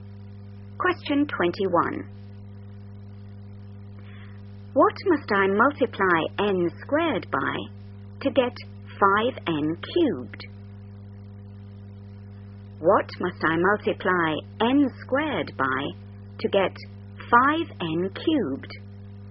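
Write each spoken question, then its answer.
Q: What must I multiply n squared by to get 5n cubed?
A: 5n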